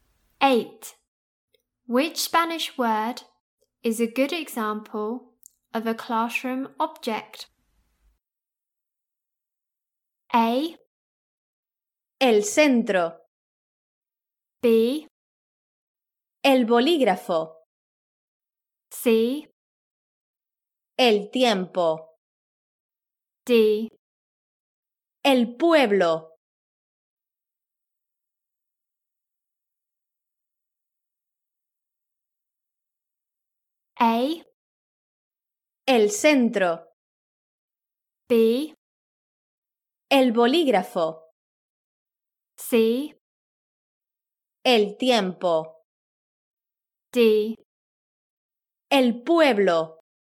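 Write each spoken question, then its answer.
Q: Which Spanish word is a good example of a classroom object?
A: B: El bolígrafo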